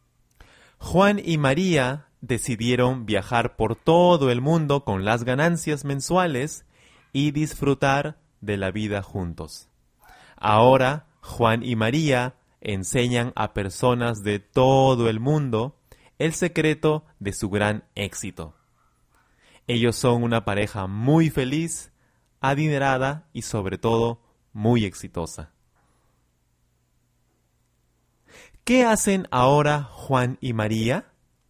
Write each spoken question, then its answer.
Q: ¿Qué hacen ahora Juan y María?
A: Actualmente, Juan y María enseñan a personas de todo el mundo el secreto de su gran éxito.